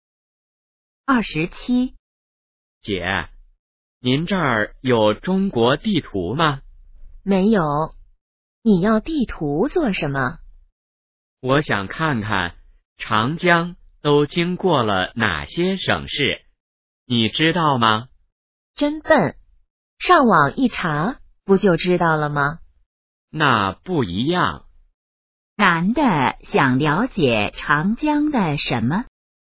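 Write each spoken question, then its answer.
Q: 男的想了解长江的什么?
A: 长江经过了哪些省市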